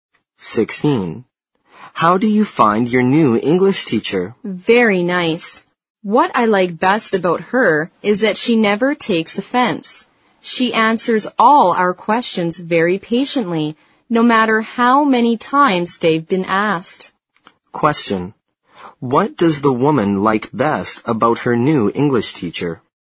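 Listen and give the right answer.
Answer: She never takes offense and answers questions patiently.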